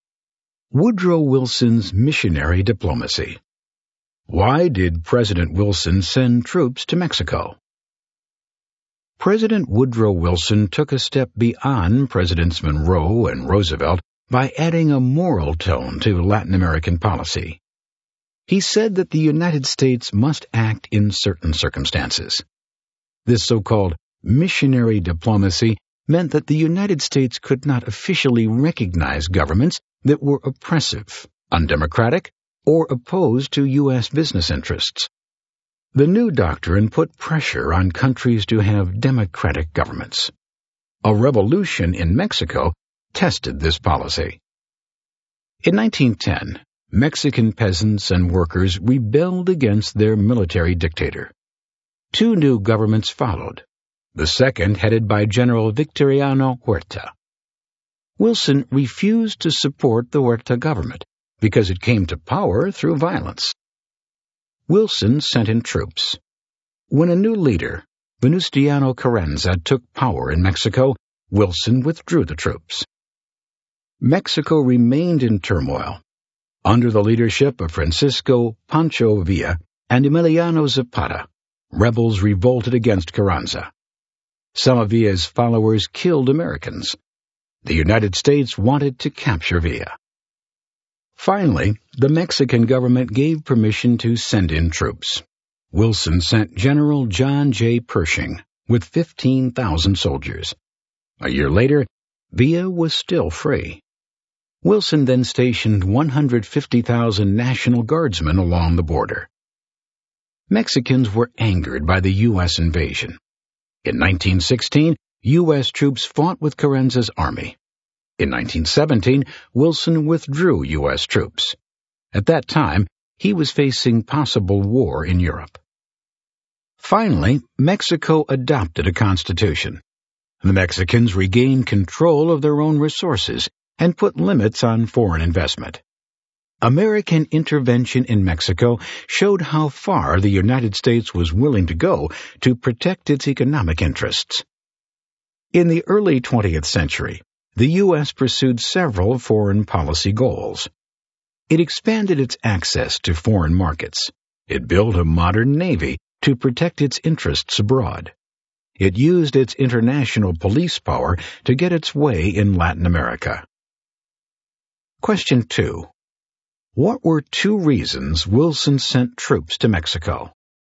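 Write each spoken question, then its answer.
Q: What were two reasons Wilson sent troops to Mexico?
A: He refused to support Huerta's government because it came to power through violence, and later he wanted to capture Pancho Villa after Villa's followers killed Americans.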